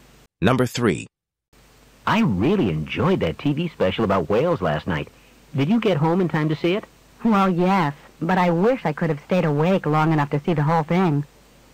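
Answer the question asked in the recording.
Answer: She fell asleep before the special ended.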